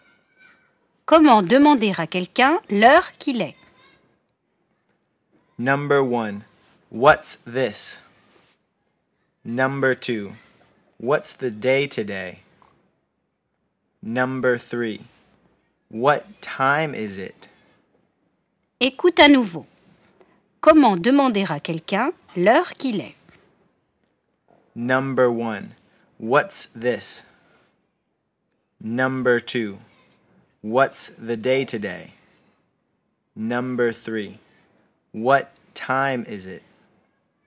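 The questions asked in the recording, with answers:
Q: Comment demander à quelqu'un l'heure qu'il est?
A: 3: What time is it?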